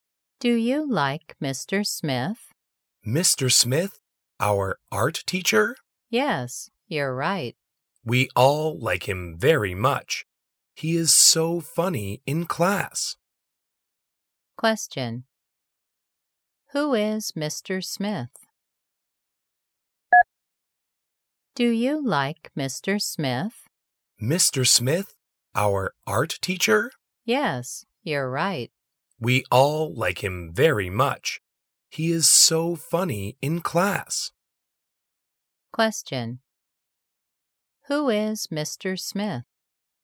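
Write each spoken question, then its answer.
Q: Who is Mr. Smith?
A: their art teacher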